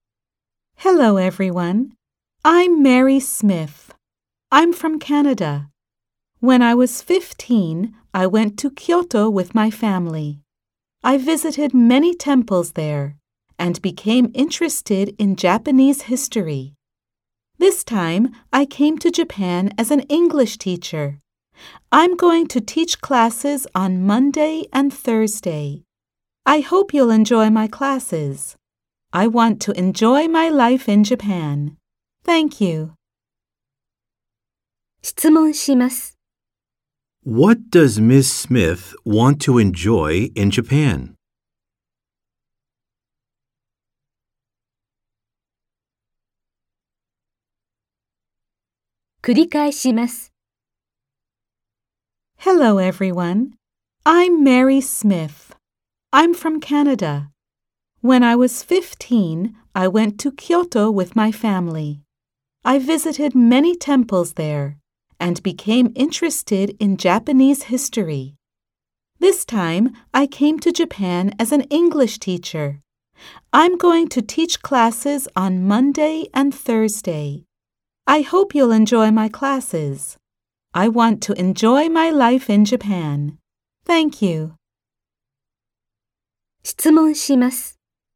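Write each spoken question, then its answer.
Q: What does Ms. Smith want to enjoy in Japan?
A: Her life in Japan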